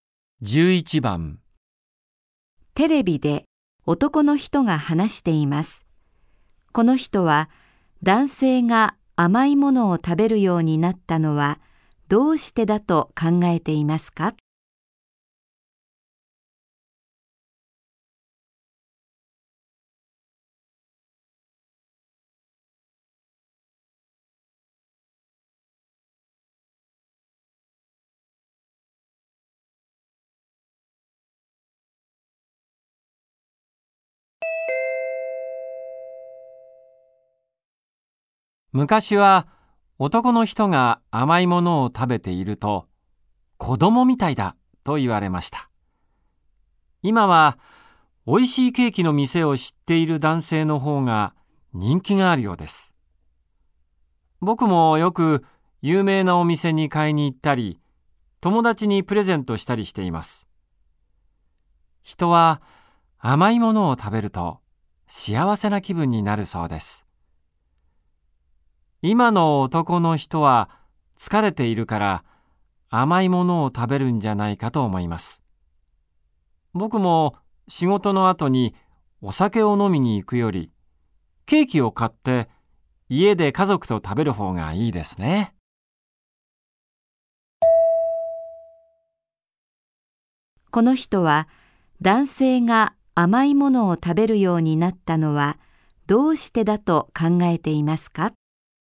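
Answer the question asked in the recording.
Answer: 疲れているから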